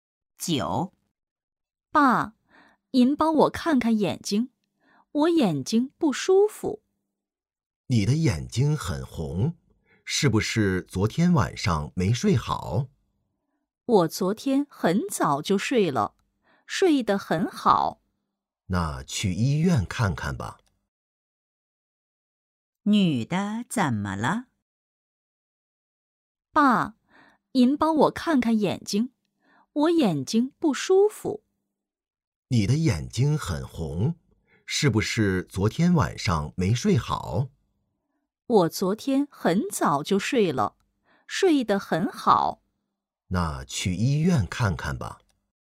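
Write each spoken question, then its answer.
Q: 女的怎么了?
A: 眼睛不舒服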